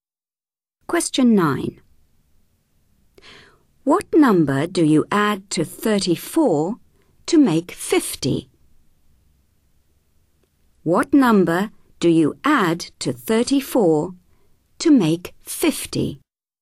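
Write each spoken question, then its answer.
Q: What number do you add to 34 to make 50?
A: 16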